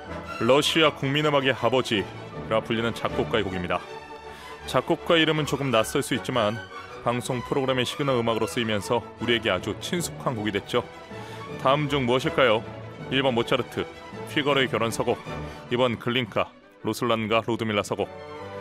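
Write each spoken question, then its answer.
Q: 다음 중 무엇일까요? 1번 모차르트, 피거로의 결혼 서곡, 2번 글린카, 로슬란과 루드밀라 서곡.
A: 2: 글린카, 로슬란과 루드밀라 서곡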